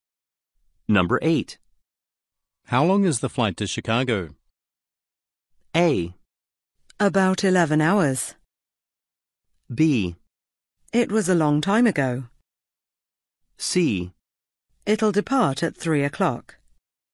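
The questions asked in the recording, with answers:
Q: How long is the flight to Chicago?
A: A: About 11 hours.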